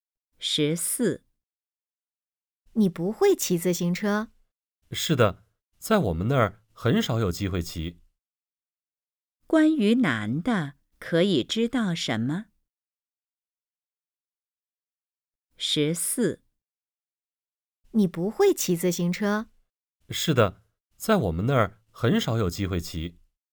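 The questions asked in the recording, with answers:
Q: 关于男的,可以知道什么?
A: 他不会骑自行车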